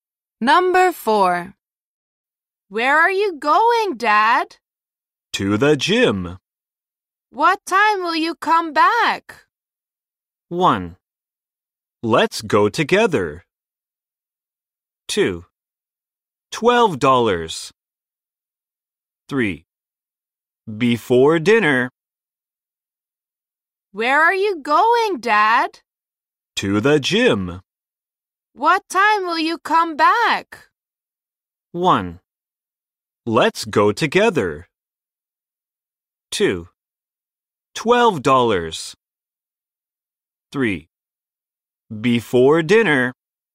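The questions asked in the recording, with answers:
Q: What time will you come back?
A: 3: Before dinner.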